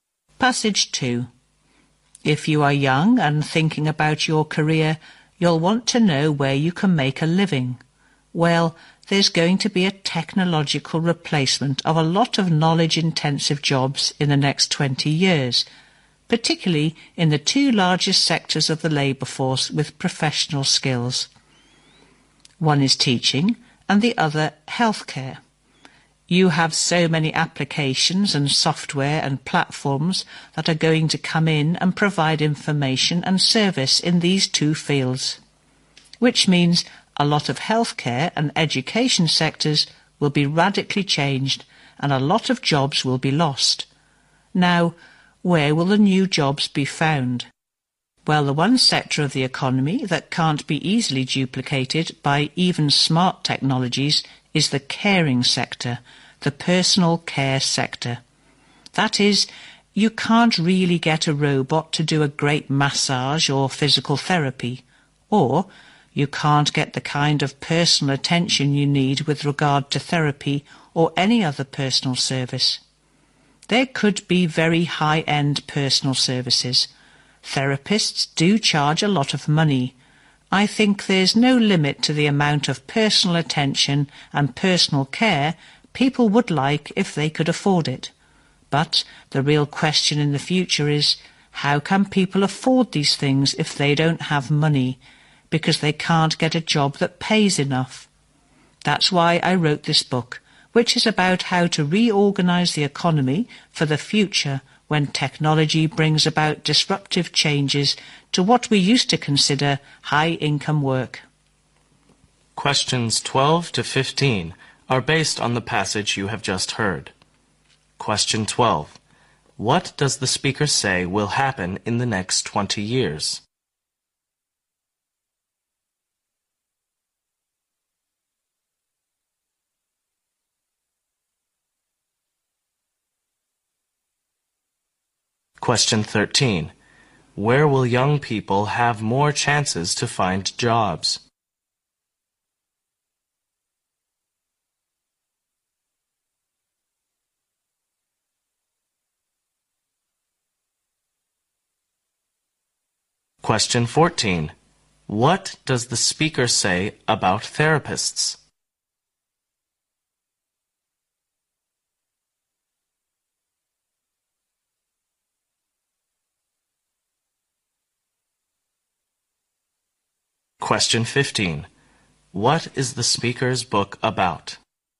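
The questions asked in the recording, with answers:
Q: What does the speaker say will happen in the next 20 years?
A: Technology will replace many knowledge-intensive jobs, especially in teaching and healthcare

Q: Where will young people have more chances to find jobs?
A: In the personal care sector

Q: What does the speaker say about therapists?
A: They charge a lot of money

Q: What is the speaker's book about?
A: How to reorganise the economy for a future of disruptive technological change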